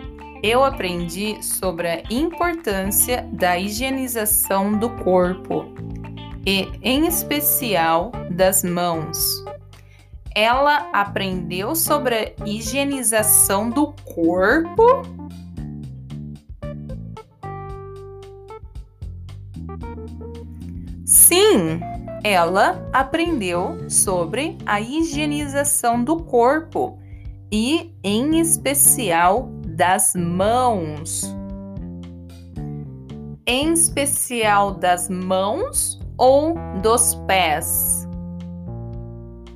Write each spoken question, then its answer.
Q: Em especial das mãos ou dos pés?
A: Das mãos, ela aprendeu em especial sobre a higienização das mãos.